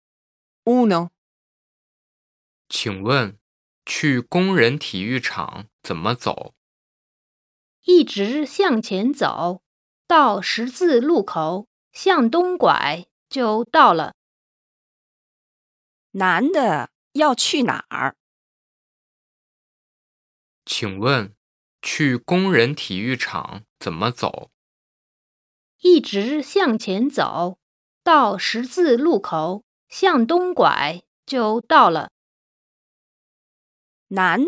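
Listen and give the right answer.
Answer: 工人体育场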